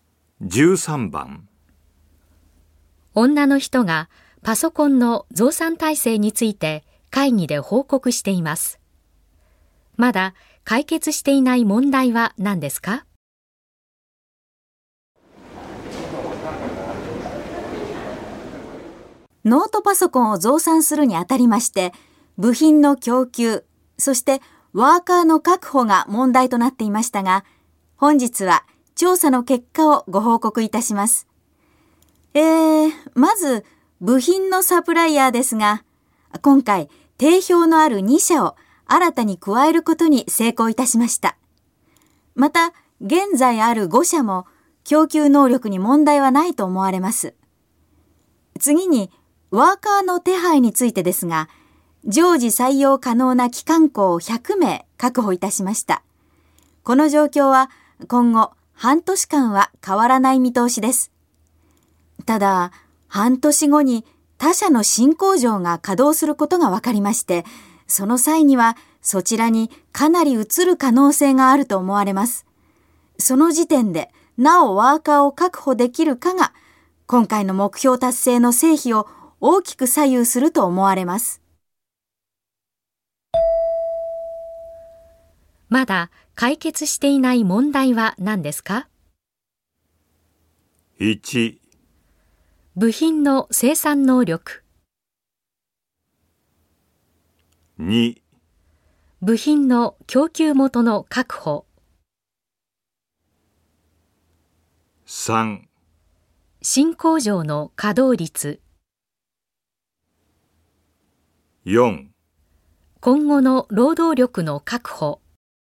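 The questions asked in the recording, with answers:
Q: まだ解決していない問題は何ですか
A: 4: 今後の労働力の確保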